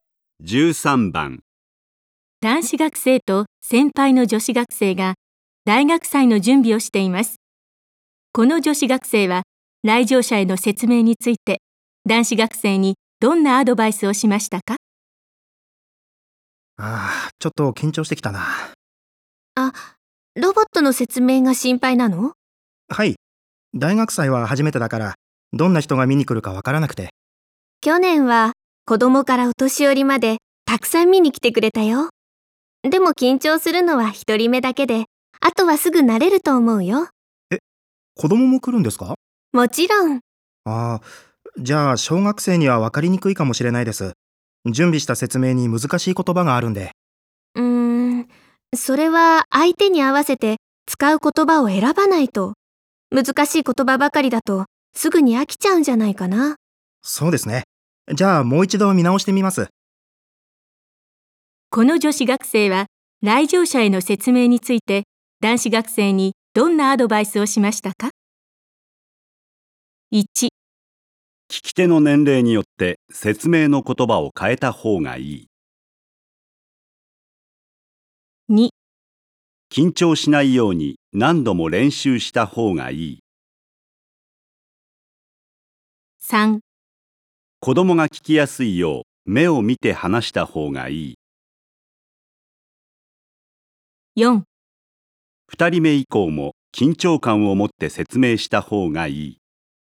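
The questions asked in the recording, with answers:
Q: この女子学生は来場者への説明について男子学生にどんなアドバイスをしましたか?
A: 1: 聞き手の年齢によって説明の言葉を変えた方がいい。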